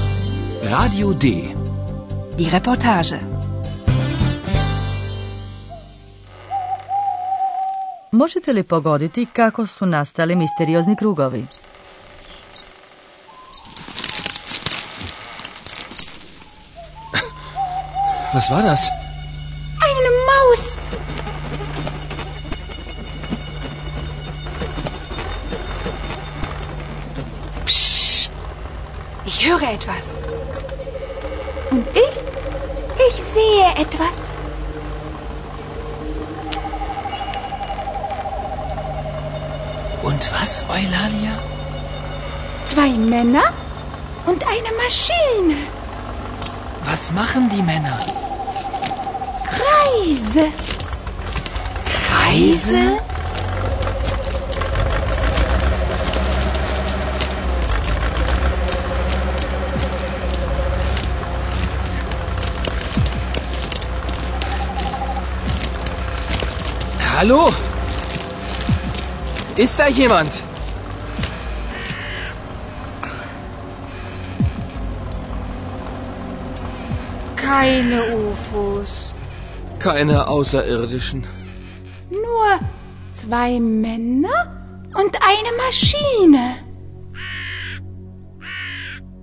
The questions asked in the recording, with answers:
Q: Možete li pogoditi kako su nastali misteriozni krugovi?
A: Dva muškarca, pretpostavljamo lokalni seljaci, jednim strojem, vjerojatno kosilicom, napravili su krugove u polju.